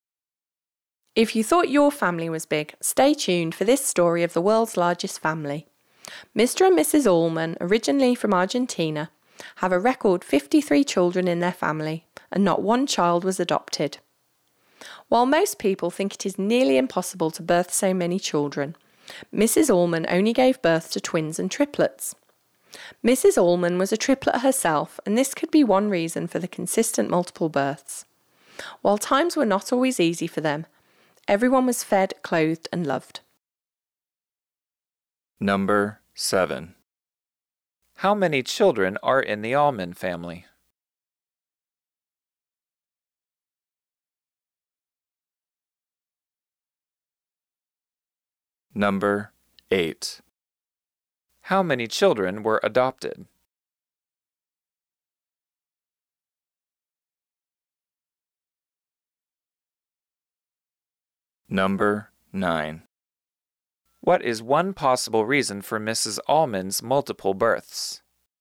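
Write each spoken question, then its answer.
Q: How many children are in the Allman family?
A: 53

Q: How many children were adopted?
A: None

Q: What is one possible reason for Mrs. Allman's multiple births?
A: She was a triplet herself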